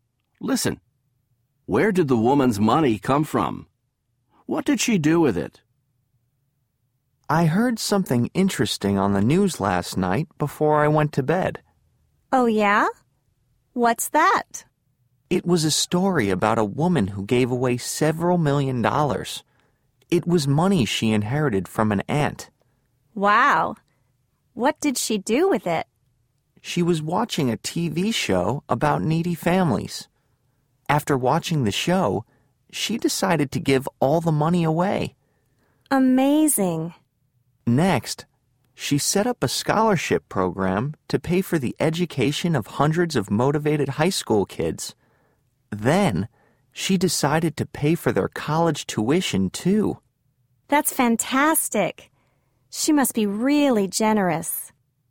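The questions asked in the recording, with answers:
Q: Where did the woman's money come from?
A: She inherited it from an aunt.

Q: What did she do with it?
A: She gave it away; she set up a scholarship program for motivated high school kids and paid their college tuition.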